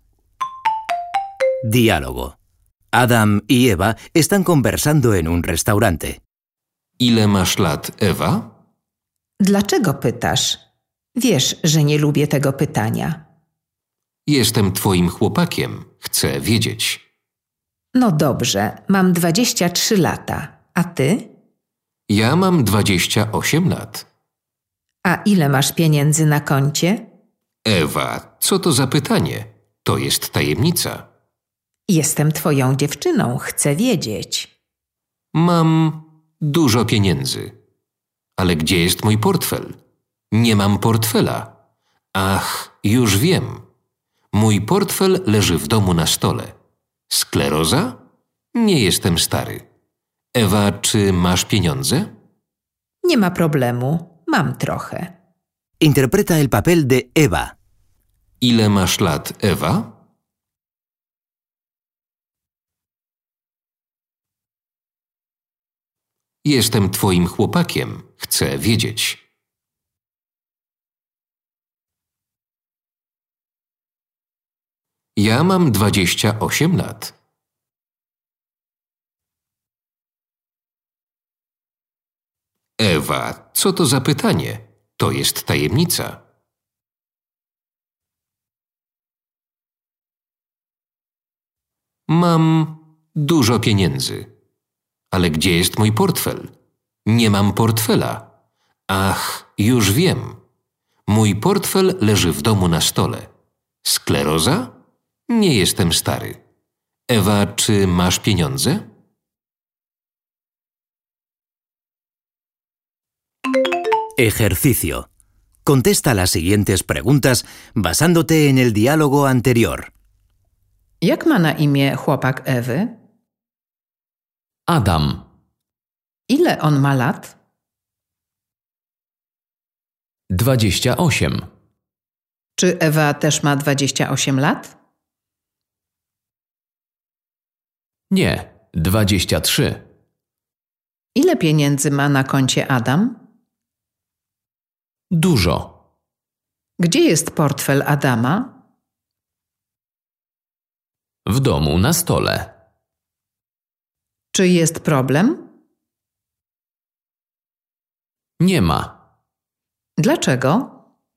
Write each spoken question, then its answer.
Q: Jak ma na imię chłopak Ewy?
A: Adam.

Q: Ile on ma lat?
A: 28.

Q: Czy Ewa też ma 28 lat?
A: Nie, 23.

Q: Ile pieniędzy ma na koncie Adam?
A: Dużo.

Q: Gdzie jest portfel Adama?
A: W domu na stole.

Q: Czy jest problem?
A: Nie ma.

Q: Dlaczego?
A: Bo Ewa ma trochę pieniędzy.